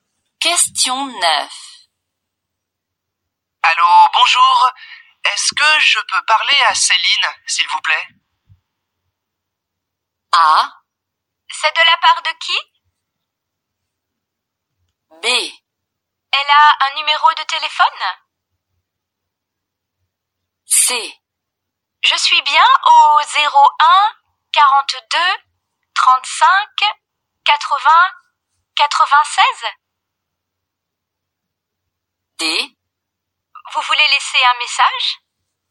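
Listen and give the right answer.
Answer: A: C'est de la part de qui ?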